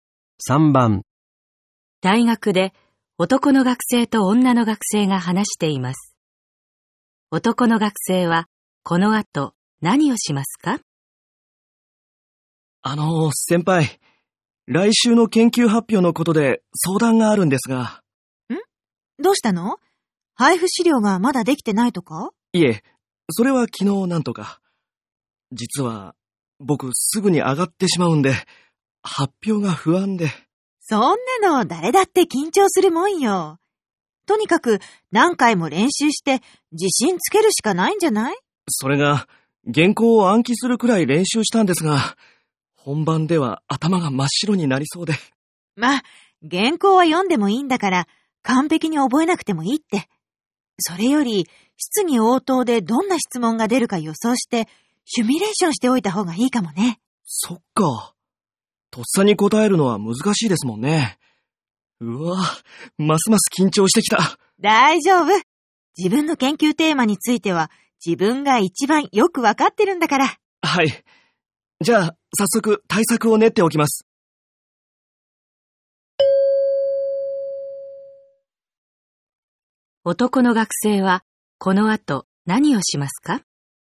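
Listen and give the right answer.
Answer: 質疑応答でどんな質問が出るか予想して準備する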